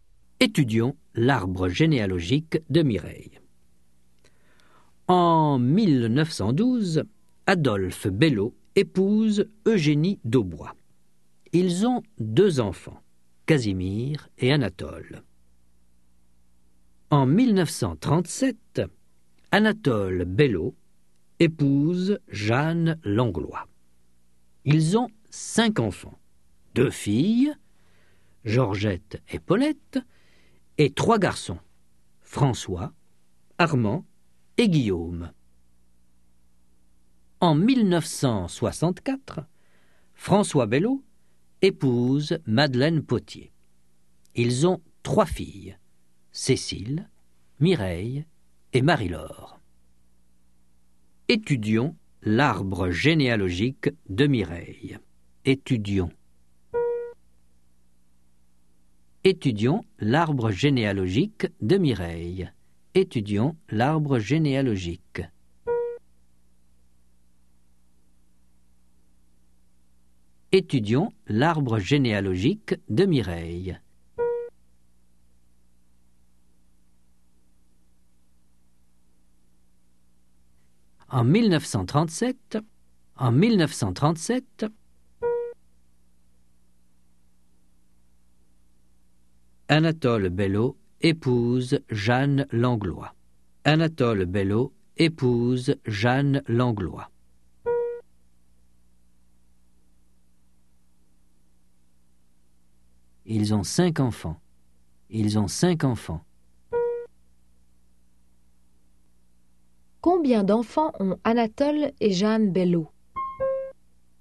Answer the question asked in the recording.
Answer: Ils ont cinq enfants.